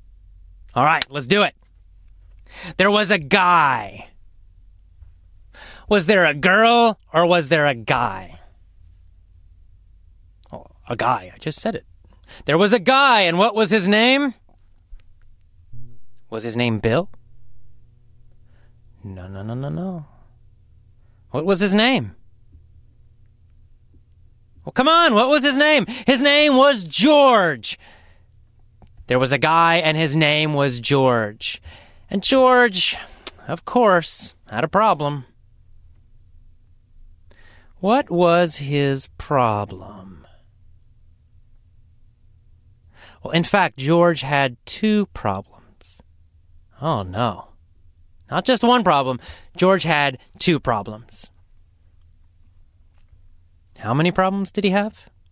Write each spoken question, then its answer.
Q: How many problems did he have?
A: Two. George had two problems.